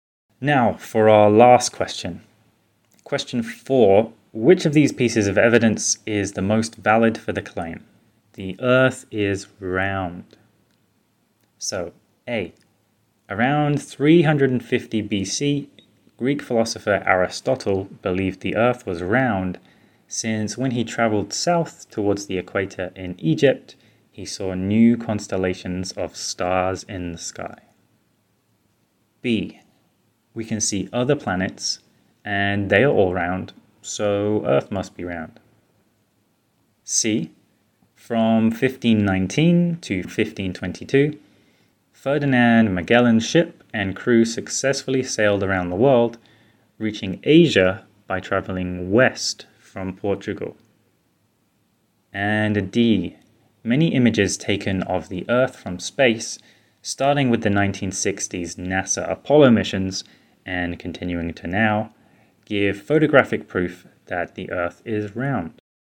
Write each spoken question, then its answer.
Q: Question 4, which of these pieces of evidence is the most valid for the claim?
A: So, while we can say that all of these sources are valid, the answer we would consider the most valid is D.